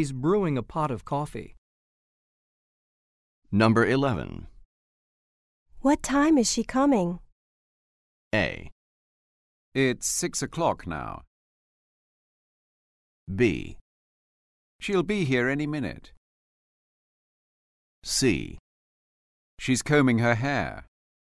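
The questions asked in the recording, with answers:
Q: What time is she coming?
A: B: She'll be here any minute.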